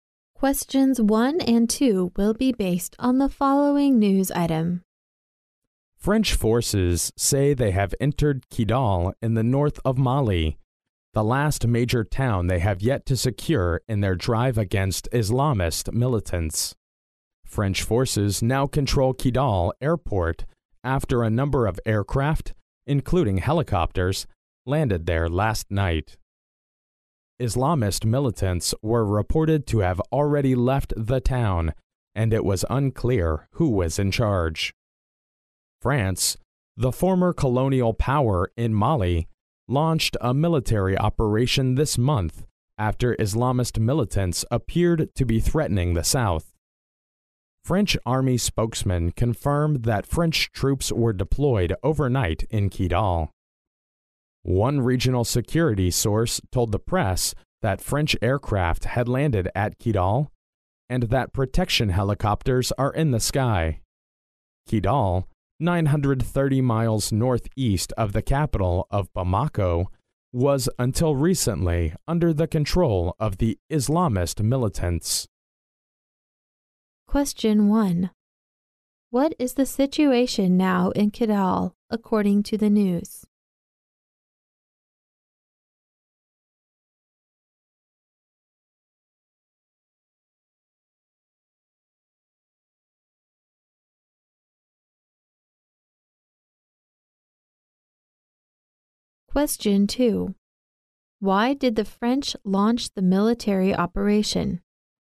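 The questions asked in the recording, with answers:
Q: What is the situation now in Kidal, according to the news?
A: French forces have entered Kidal and control its airport; the militants have left and it is unclear who is in charge

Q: Why did the French launch the military operation?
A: Islamist militants appeared to be threatening the south of Mali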